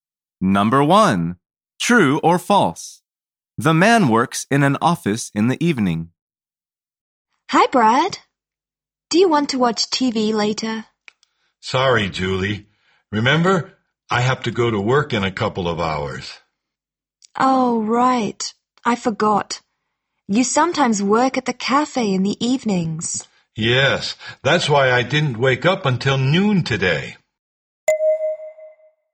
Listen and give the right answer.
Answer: The answer is false. He sometimes works at a cafe in the evening.